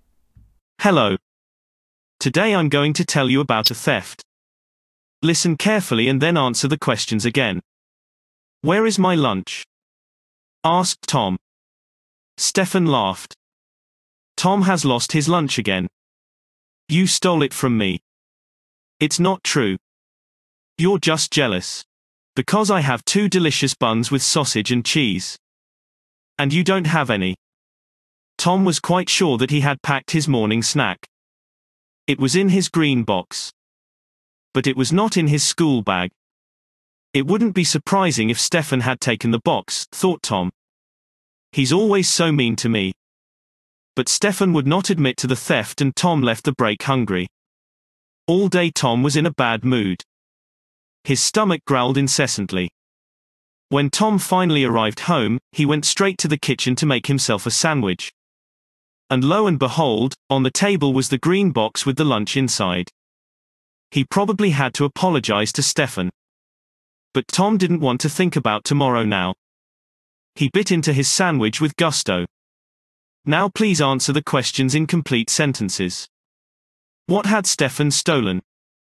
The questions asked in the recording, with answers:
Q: What had Stefan stolen?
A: Stefan did not steal anything at all, but was falsely accused of stealing.